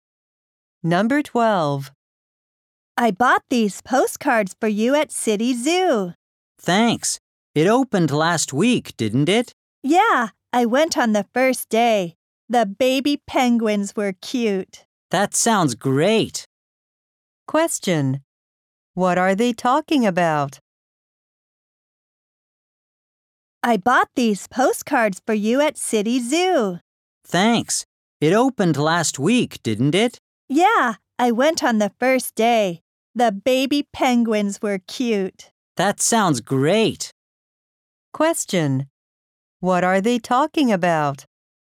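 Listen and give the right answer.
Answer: A trip to City Zoo, which opened last week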